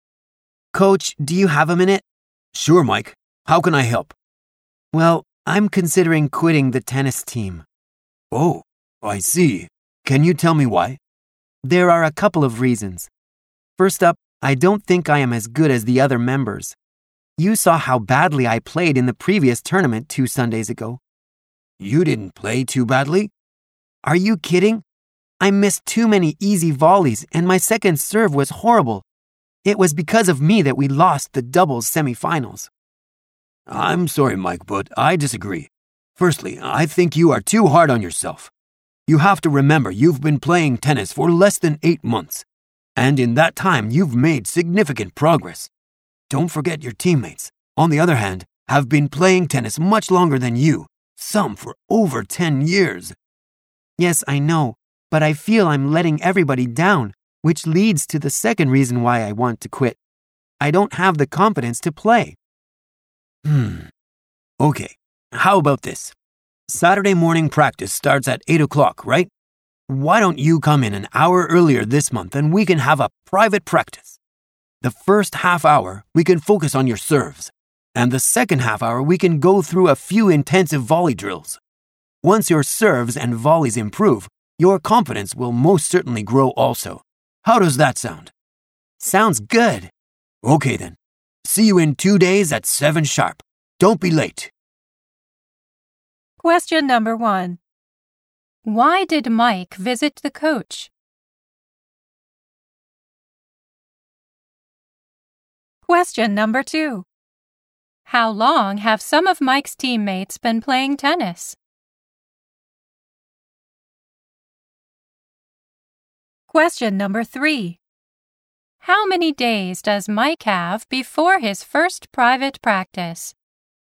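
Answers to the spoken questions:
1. Because he was considering quitting the tennis team.
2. For over 10 years.
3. Two days.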